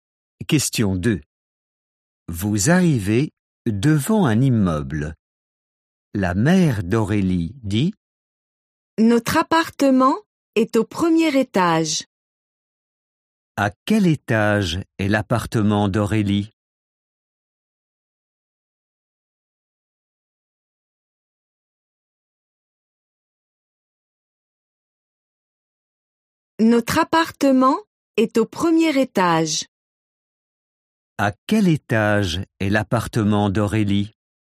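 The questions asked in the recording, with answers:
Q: À quel étage est l'appartement d'Aurélie?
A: Au premier étage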